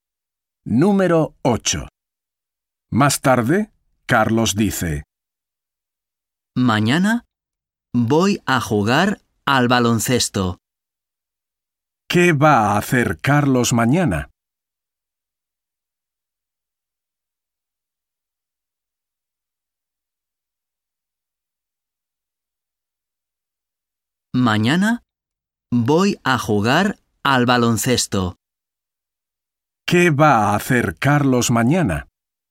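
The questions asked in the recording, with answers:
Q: ¿Qué va a hacer Carlos mañana?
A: jugar al baloncesto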